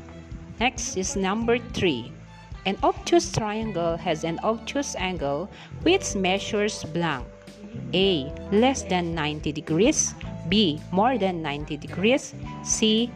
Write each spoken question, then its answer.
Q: An obtuse triangle has an obtuse angle which measures blank.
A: The correct answer is letter B. More than 90 degrees.